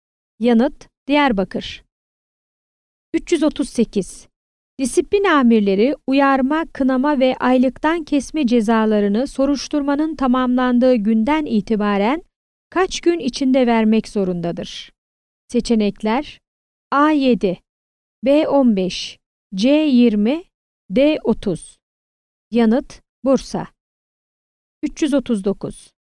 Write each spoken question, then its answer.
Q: Disiplin amirleri uyarma, kınama ve aylıktan kesme cezalarını soruşturmanın tamamlandığı günden itibaren kaç gün içinde vermek zorundadır?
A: Yanıt: Bursa.